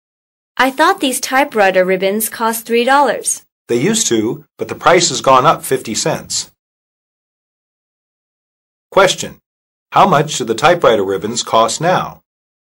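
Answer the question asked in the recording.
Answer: $3.50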